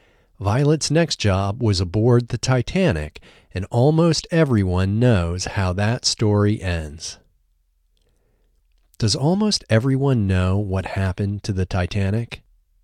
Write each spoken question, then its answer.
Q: Does almost everyone know what happened to the Titanic?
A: Yes, almost everyone knows what happened to the Titanic.